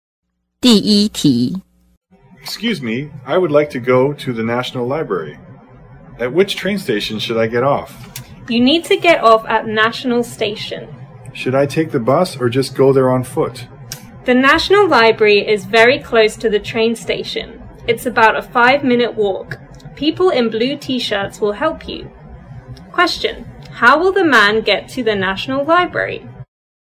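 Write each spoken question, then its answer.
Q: how will the man get to the National Library?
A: By train, then walk from National Station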